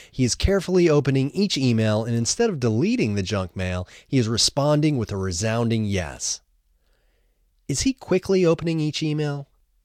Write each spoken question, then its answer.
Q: Is he quickly opening each email?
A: No, he isn't quickly opening each email.